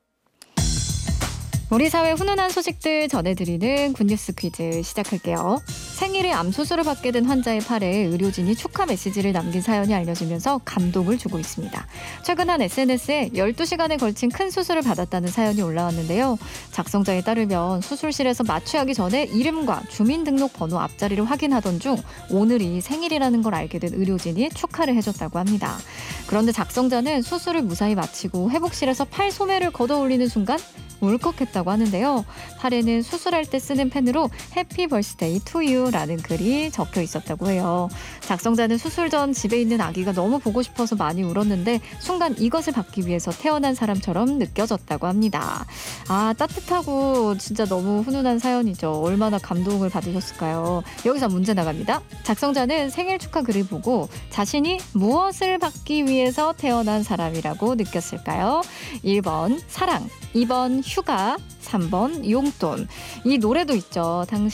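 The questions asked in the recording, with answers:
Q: 작성자는 생일 축하 글을 보고 자신이 무엇을 받기 위해서 태어난 사람이라고 느꼈을까요?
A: 1번: 사랑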